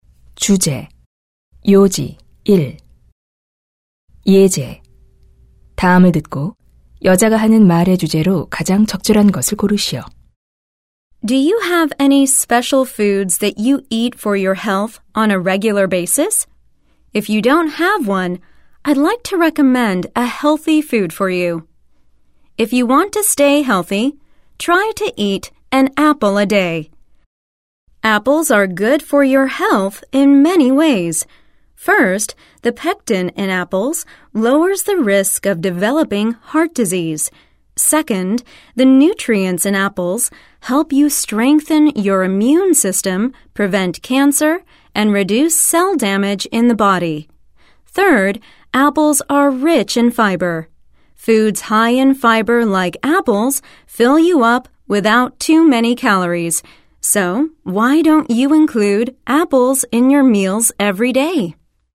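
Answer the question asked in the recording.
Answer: 사과를 매일 먹는 것의 건강상 이점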